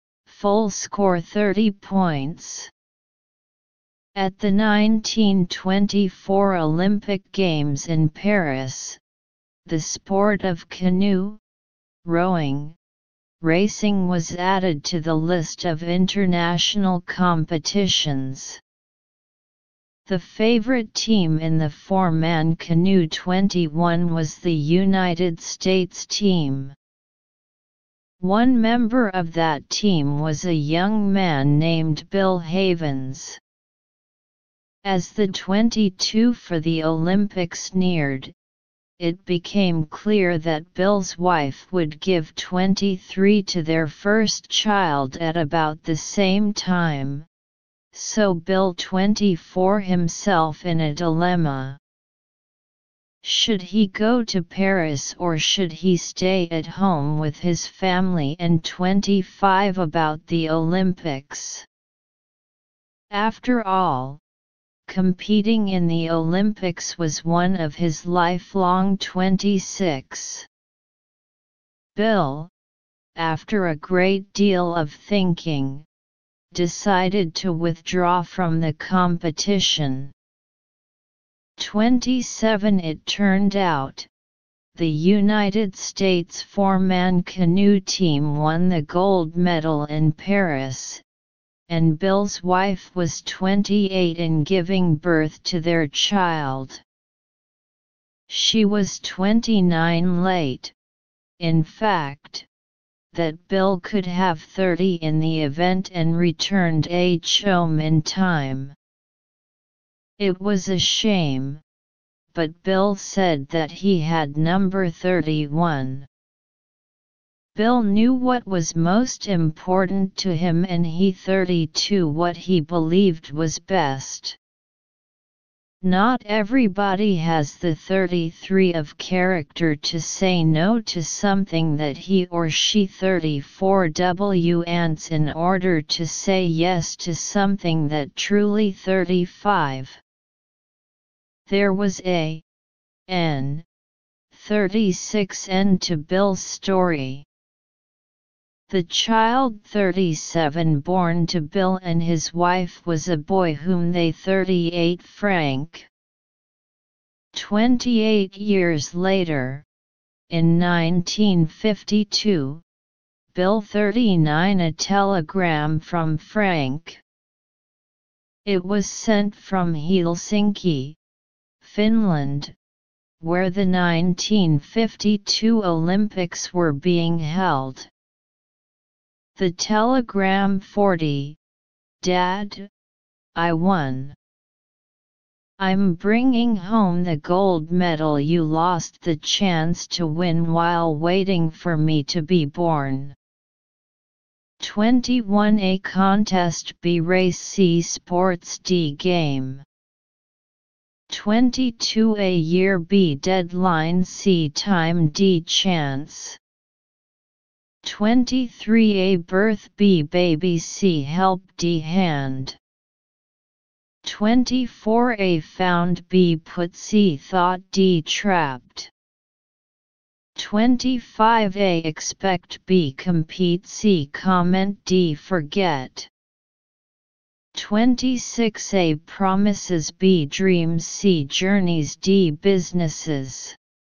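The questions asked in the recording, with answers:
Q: 21 A contest B race C sports D game.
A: B: race

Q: 22 A year B deadline C time D chance.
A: C: time

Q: 23 A birth B baby C help D hand.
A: A: birth

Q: 24 A found B put C thought D trapped.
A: A: found

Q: 25 A expect B compete C comment D forget.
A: D: forget

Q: 26 A promises B dreams C journeys D businesses.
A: B: dreams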